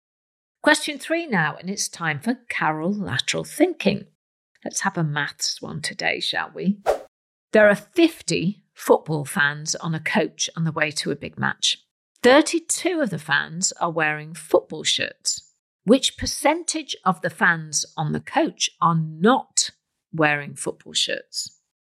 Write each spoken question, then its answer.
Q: Which percentage of the fans on the coach are not wearing football shirts?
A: And the answer is 36%. 18 of the fans are not wearing shirts.